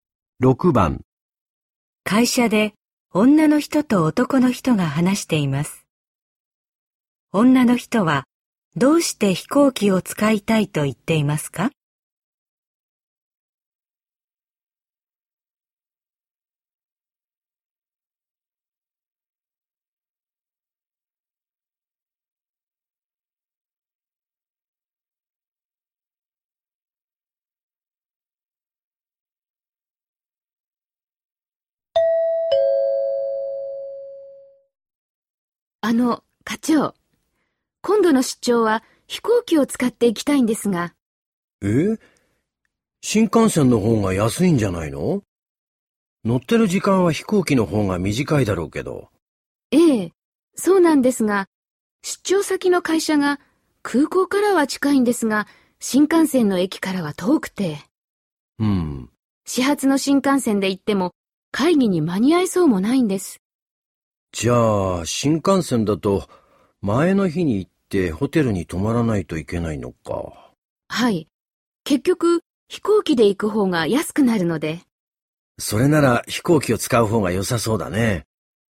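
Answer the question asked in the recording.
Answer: 新幹線だと前の日にホテルに泊まる必要があり、飛行機の方が安くなるから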